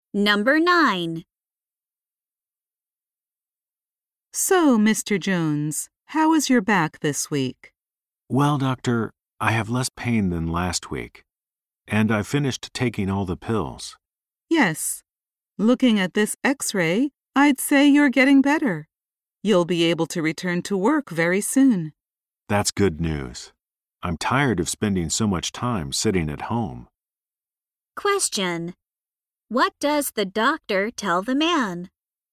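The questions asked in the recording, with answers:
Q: What does the doctor tell the man?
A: He will be able to return to work soon.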